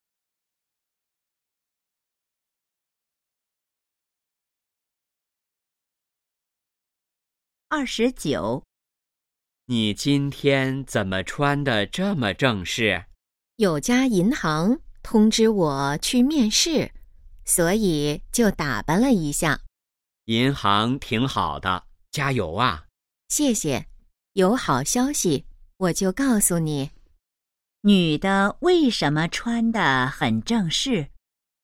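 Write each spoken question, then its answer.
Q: 女的为什么穿得很正式?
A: 去银行面试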